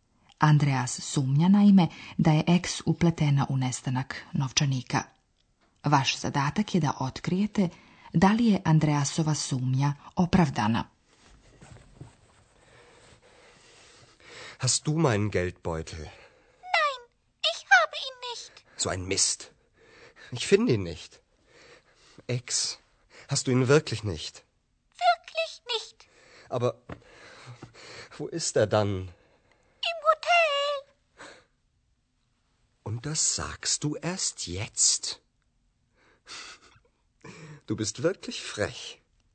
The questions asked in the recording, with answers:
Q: Vaš zadatak je da otkrijete da li je Andreasova sumnja opravdana.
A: Naravno, Ex nije uzela novčanik.